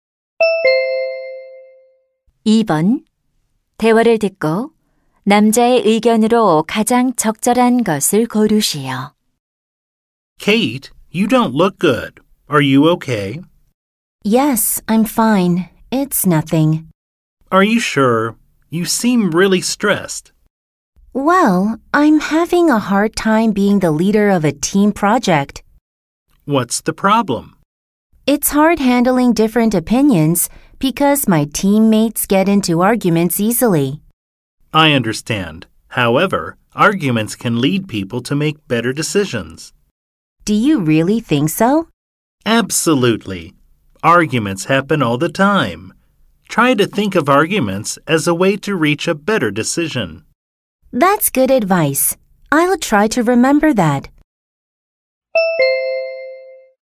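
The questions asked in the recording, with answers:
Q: 대화를 듣고 남자의 의견으로 가장 적절한 것을 고르시오.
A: 논쟁은 더 나은 결정을 내리는 데 도움이 될 수 있다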